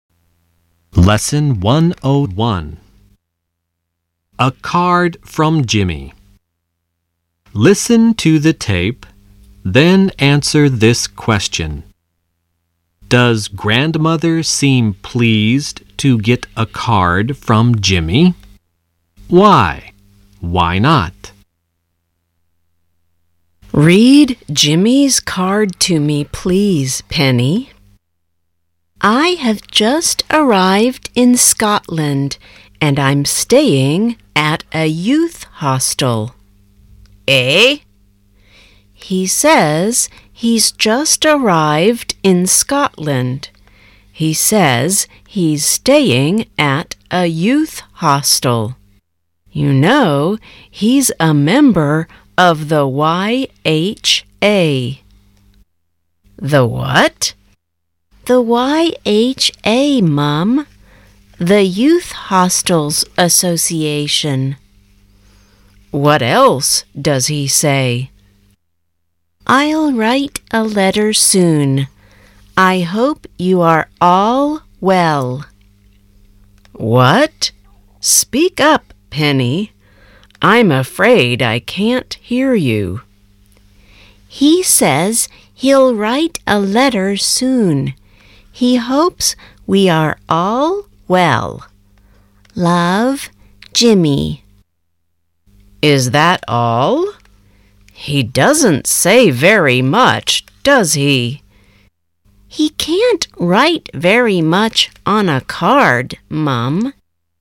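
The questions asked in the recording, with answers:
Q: Does grandmother seem pleased to get a card from Jimmy?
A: No, she thinks he doesn't say very much on the card.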